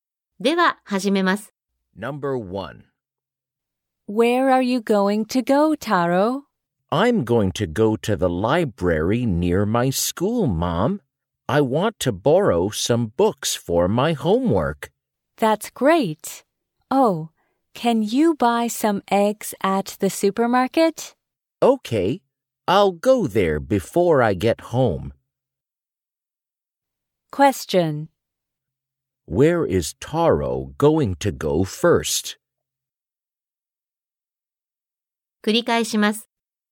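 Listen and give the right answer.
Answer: To the library near his school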